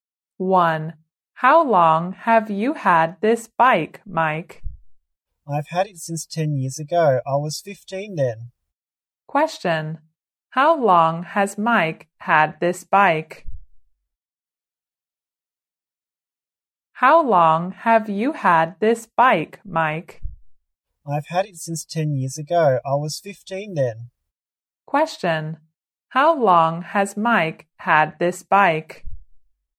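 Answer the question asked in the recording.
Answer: For 10 years.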